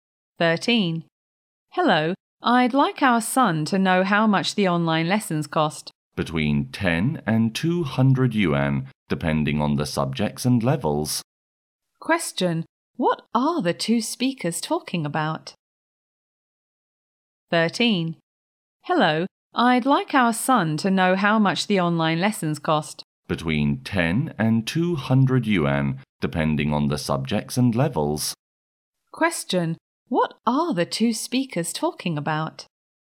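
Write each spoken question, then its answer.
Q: what are the two speakers talking about?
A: The cost of online lessons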